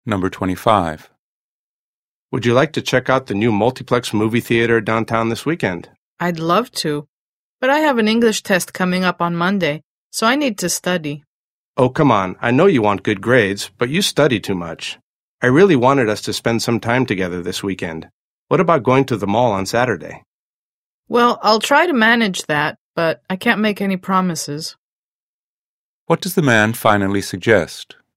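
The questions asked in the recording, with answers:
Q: What does the man finally suggest?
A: Going to the mall on Saturday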